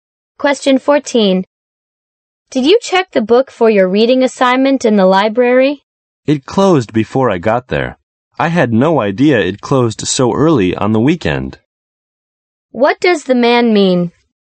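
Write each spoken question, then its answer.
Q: What does the man mean?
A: He didn't get the book because the library closed early on the weekend.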